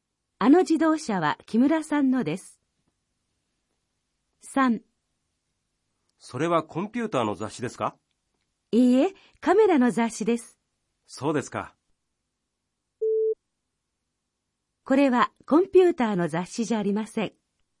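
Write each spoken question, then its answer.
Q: これはコンピューターの雑誌じゃありません。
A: ○(カメラの雑誌です)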